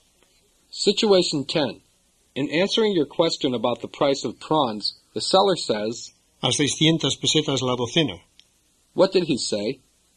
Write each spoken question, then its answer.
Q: What did he say?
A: He said 600 pesetas a dozen.